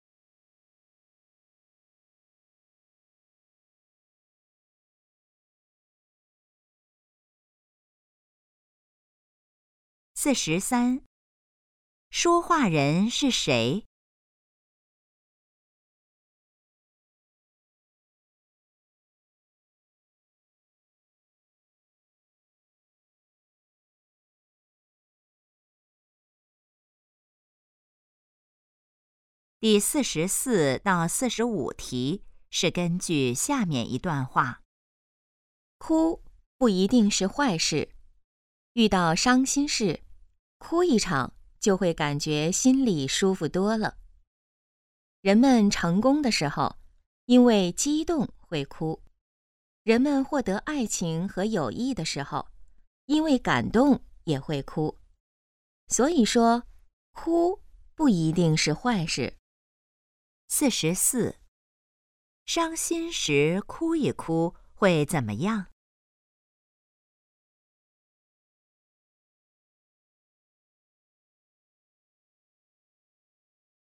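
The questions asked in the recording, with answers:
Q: 伤心时哭一哭会怎么样?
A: 心里会舒服多了

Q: 这段话主要想告诉我们什么?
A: 哭不一定是坏事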